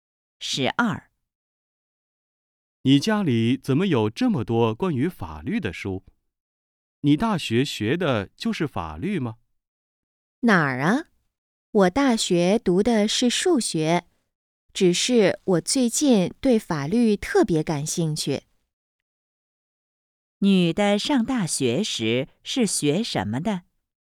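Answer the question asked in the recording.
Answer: 数学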